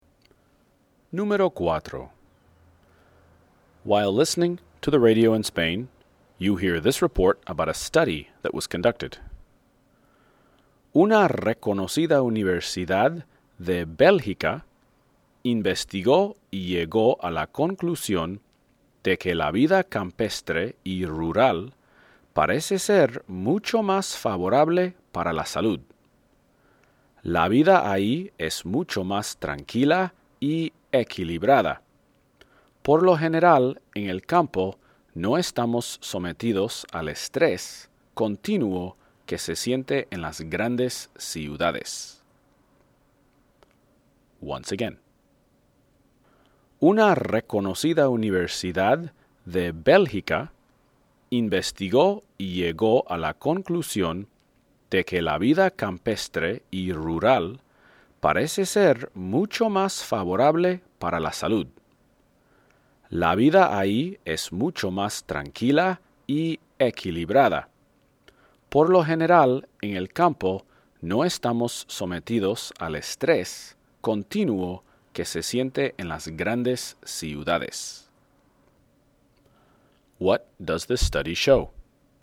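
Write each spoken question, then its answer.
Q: What does this study show?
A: Country (rural) life is healthier than city life, being calmer and less stressful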